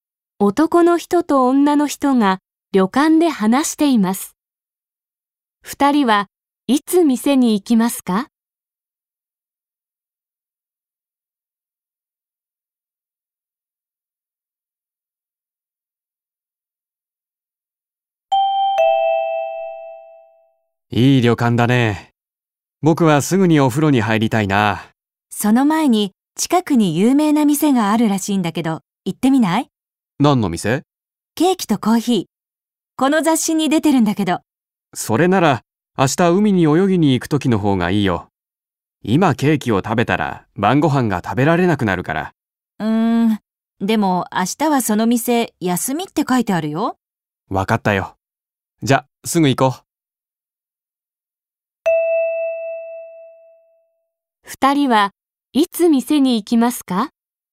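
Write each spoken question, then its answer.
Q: 二人はいつ店に行きますか?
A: 今すぐ(お風呂に入る前)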